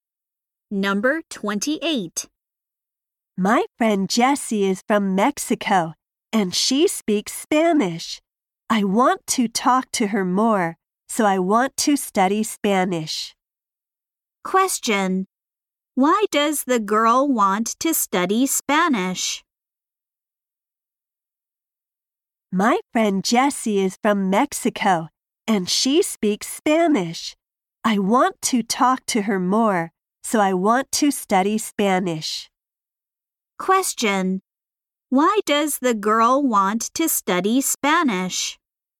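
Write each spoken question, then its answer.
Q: Why does the girl want to study Spanish?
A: To talk to her friend Jessie more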